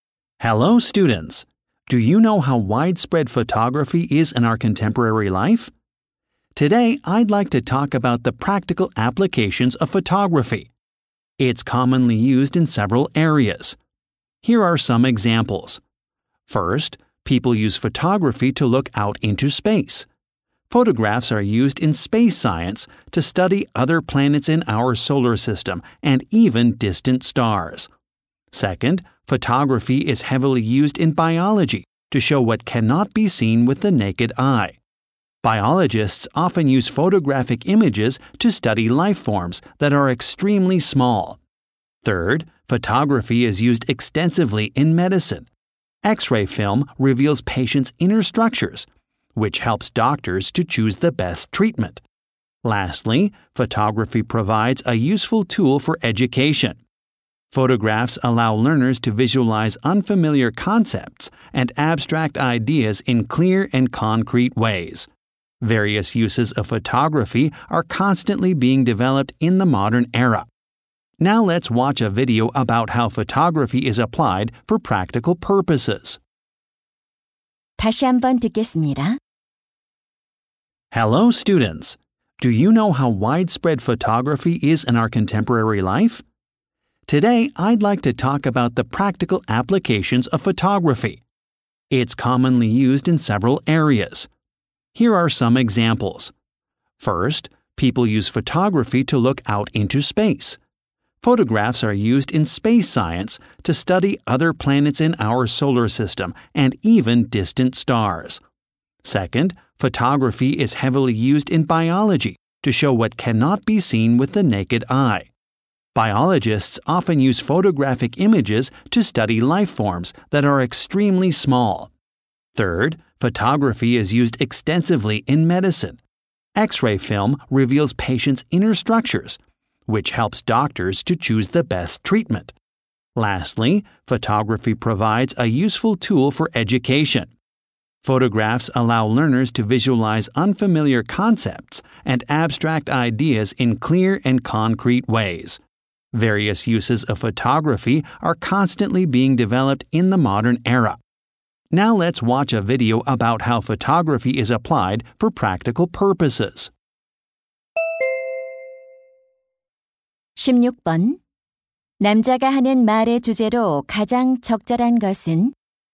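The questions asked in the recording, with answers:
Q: 남자가 하는 말의 주제로 가장 적절한 것은?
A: 사진의 실용적인 활용 분야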